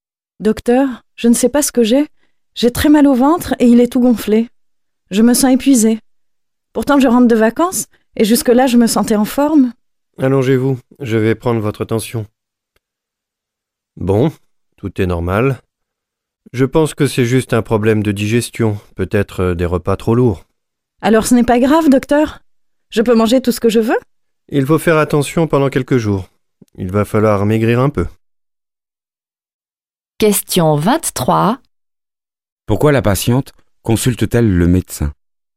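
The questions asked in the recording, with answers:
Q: Pourquoi la patiente consulte-t-elle le médecin?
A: Elle a très mal au ventre, il est gonflé, et elle se sent épuisée.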